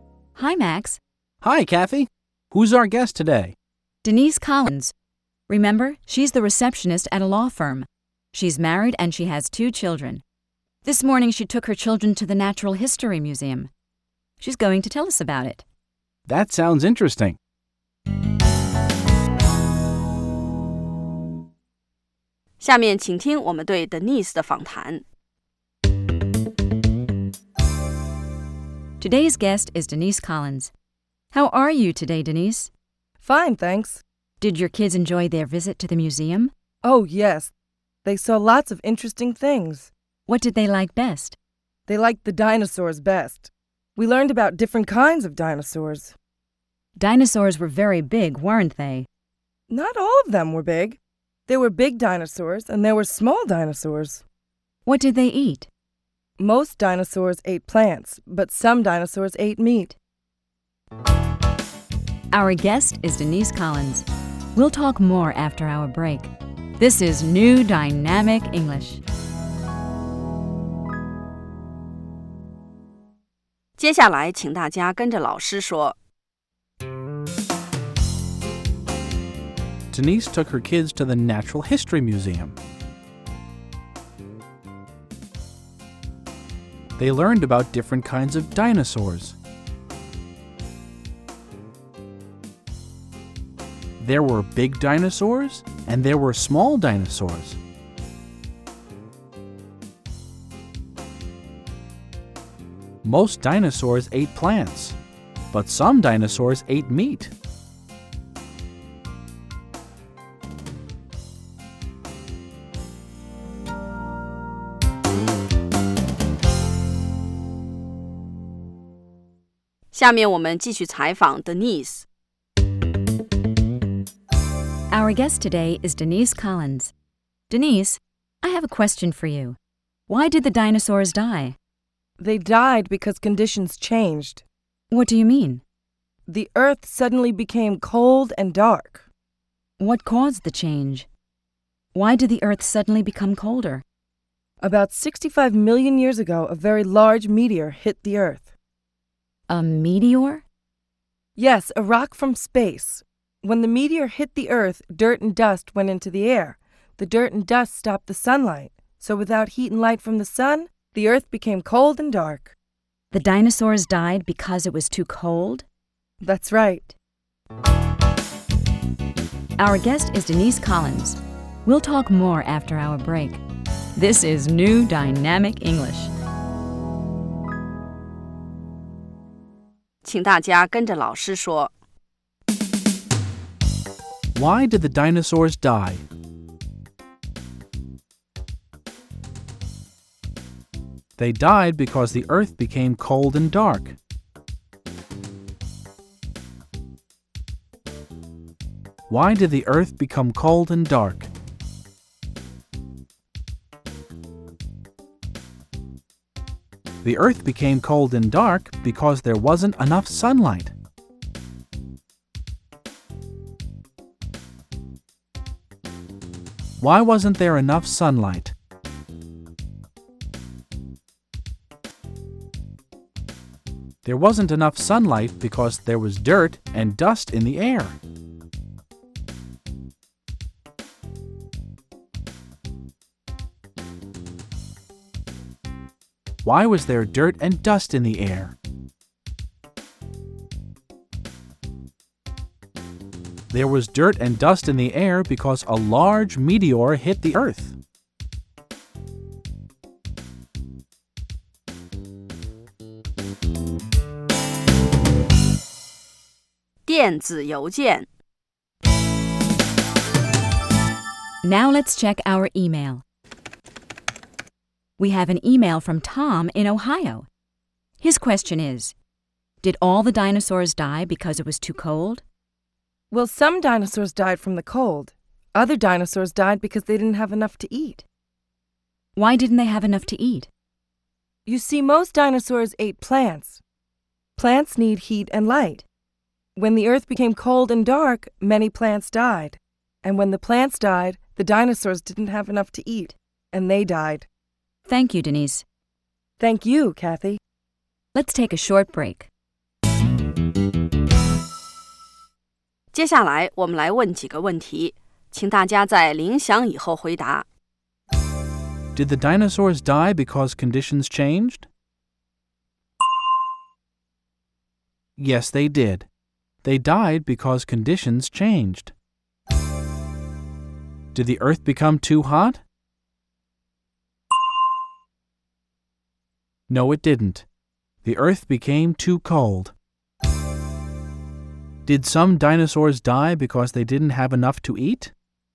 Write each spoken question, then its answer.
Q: Did the dinosaurs die because conditions changed?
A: Yes, they did. They died because conditions changed.

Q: Did some dinosaurs die because they didn't have enough to eat?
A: Yes, they did. Some dinosaurs didn't have enough plants to eat, so they died.